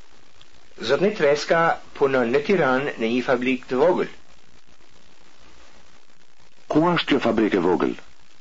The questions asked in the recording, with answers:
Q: Ku është kjo fabrikë e vogël?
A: Kjo fabrikë e vogël është në Tiranë.